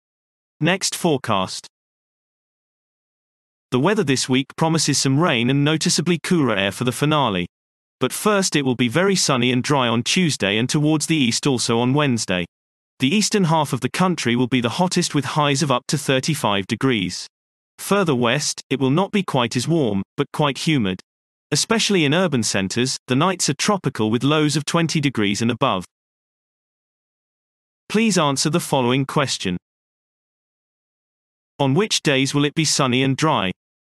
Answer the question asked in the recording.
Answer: Sunny and dry weather is forecast for Tuesday and Wednesday.